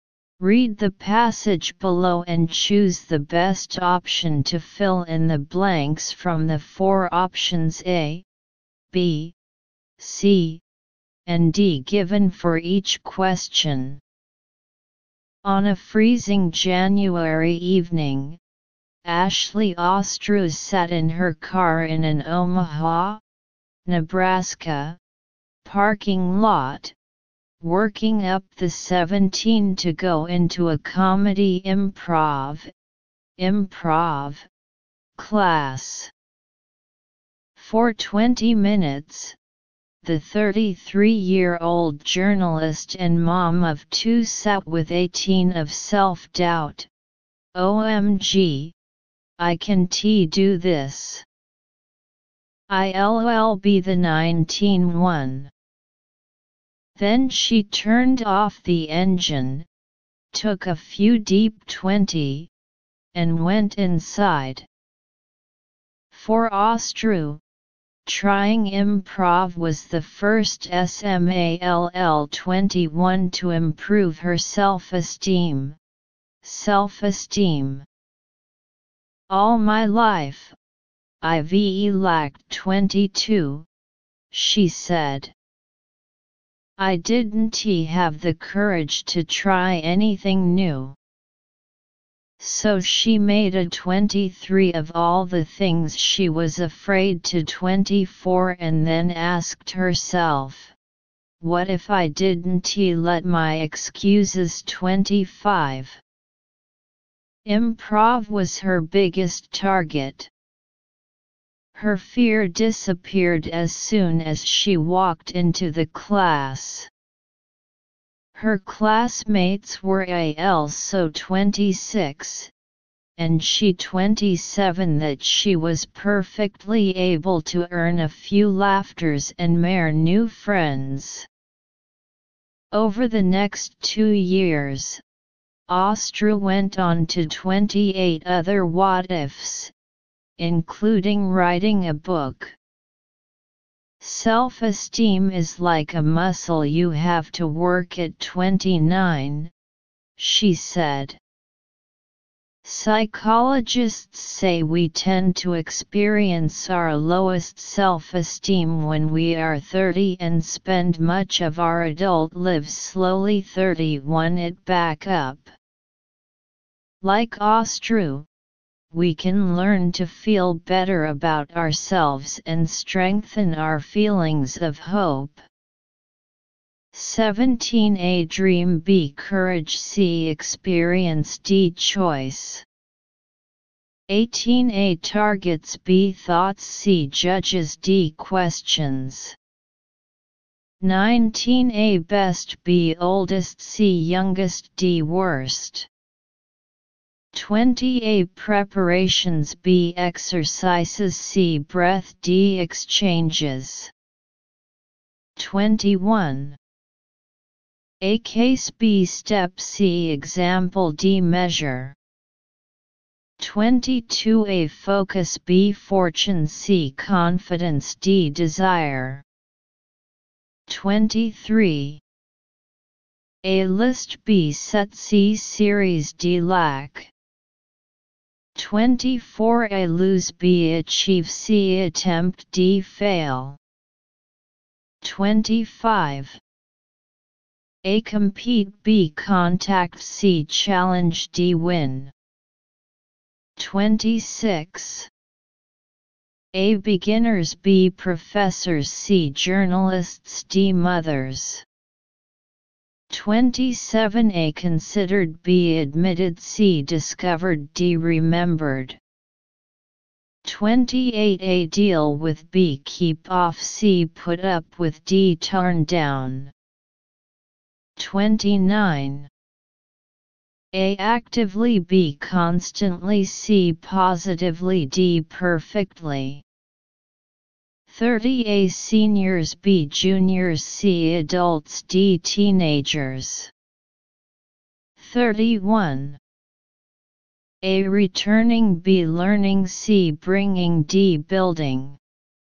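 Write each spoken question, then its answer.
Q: 17 A dream, B courage, C experience, D choice.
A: B: courage

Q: 18 A targets, B thoughts, C judges, D questions.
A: B: thoughts

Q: 19 A best, B oldest, C youngest, D worst.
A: D: worst

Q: 20 A preparations, B exercises, C breath, D exchanges.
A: C: breath

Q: 21 A case, B step, C example, D measure.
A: B: step

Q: 22 A focus, B fortune, C confidence, D desire.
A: C: confidence

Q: 23 A list, B set, C series, D lack.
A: A: list

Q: 24 A lose, B achieve, C attempt, D fail.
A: C: attempt

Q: 25 A compete, B contact, C challenge, D win.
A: D: win

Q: 26 A beginners, B professors, C journalists, D mothers.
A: A: beginners

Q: 27 A considered, B admitted, C discovered, D remembered.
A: C: discovered

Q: 28 A deal with, B keep off, C put up with, D turn down.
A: A: deal with

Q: 29 A actively, B constantly, C positively, D perfectly.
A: B: constantly

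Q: 30 A seniors, B juniors, C adults, D teenagers.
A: D: teenagers

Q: 31 A returning, B learning, C bringing, D building.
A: D: building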